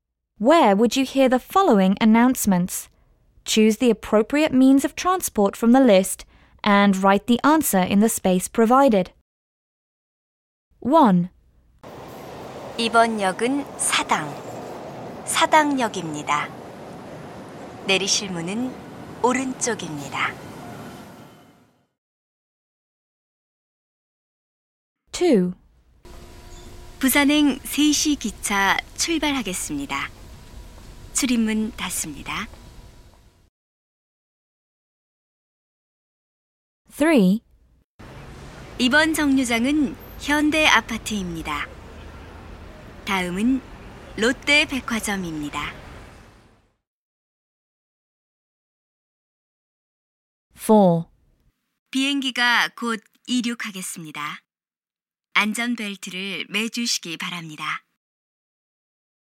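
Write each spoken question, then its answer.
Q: Where would you hear the following announcements?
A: subway

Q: Where would you hear the following announcements?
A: train

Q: Where would you hear the following announcements?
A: bus

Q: Where would you hear the following announcements?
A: airplane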